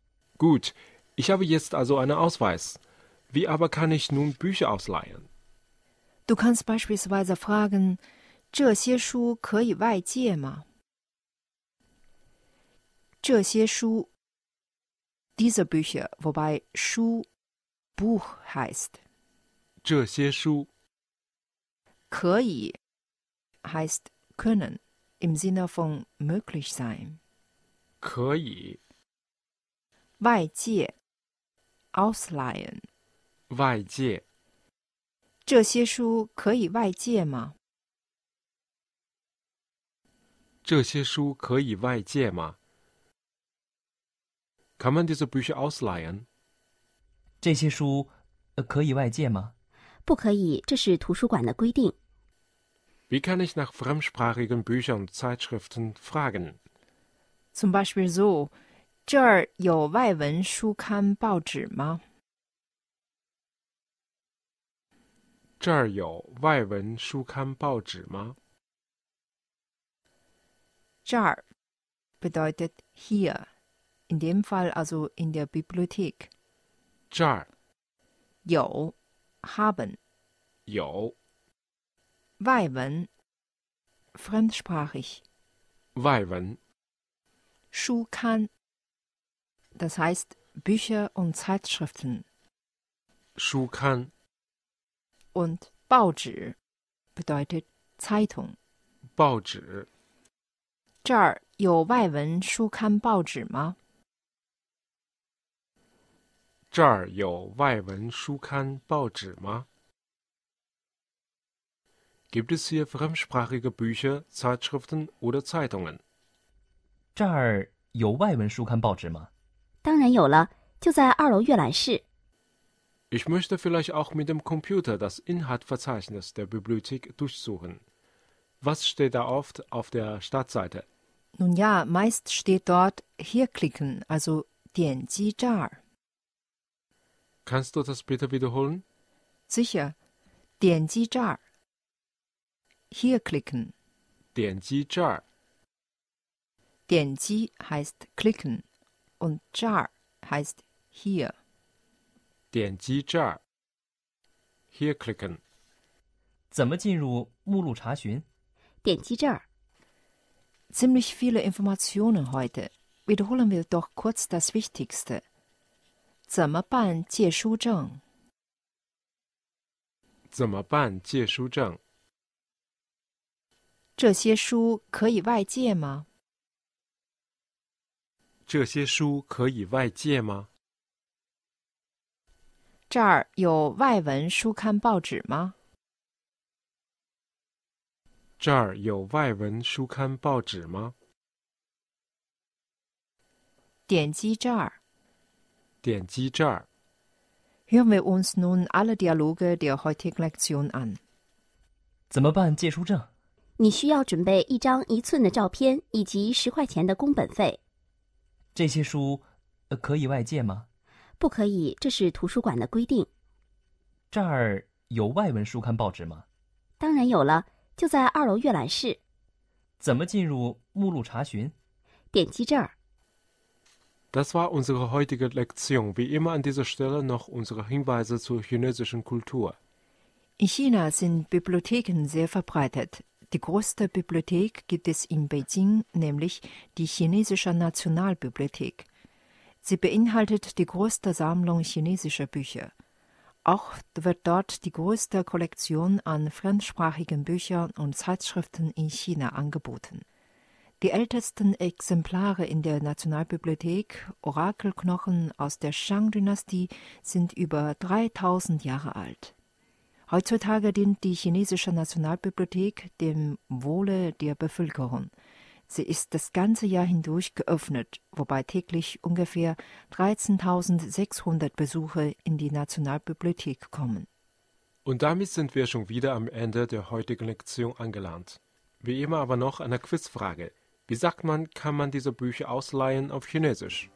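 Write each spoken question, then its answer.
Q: Wie sagt man, kann man diese Bücher ausleihen auf Chinesisch?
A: 这些书可以外借吗?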